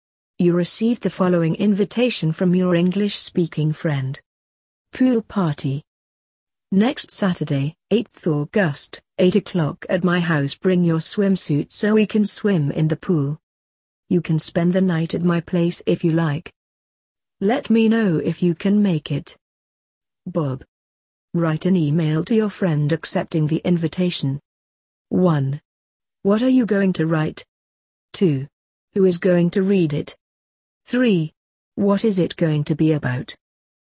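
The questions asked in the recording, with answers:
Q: What are you going to write?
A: An informal email accepting the invitation

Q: Who is going to read it?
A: My English-speaking friend, Bob

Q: What is it going to be about?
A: Accepting Bob's invitation to his pool party next Saturday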